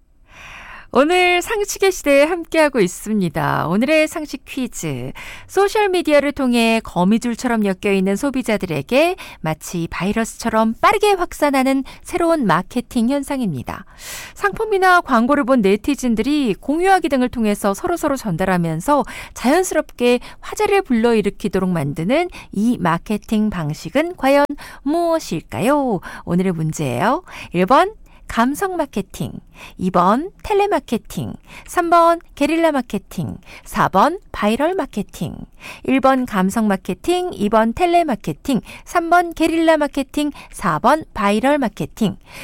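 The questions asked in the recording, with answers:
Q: 상품이나 광고를 본 네티즌들이 공유하기 등을 통해서 서로서로 전달하면서 자연스럽게 화제를 불러일으키도록 만드는 이 마케팅 방식은 과연 무엇일까요?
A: 4: 바이럴 마케팅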